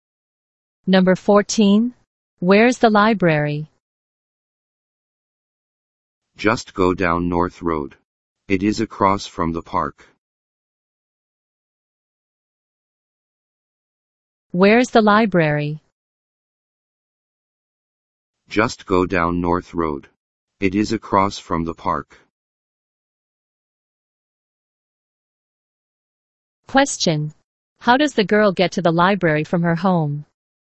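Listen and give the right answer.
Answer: Just go down North Road.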